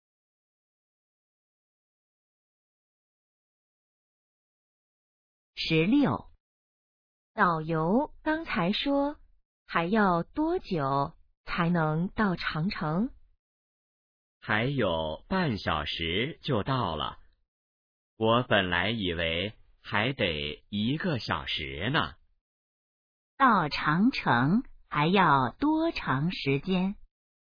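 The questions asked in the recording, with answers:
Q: 到长城还要多长时间?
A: 半小时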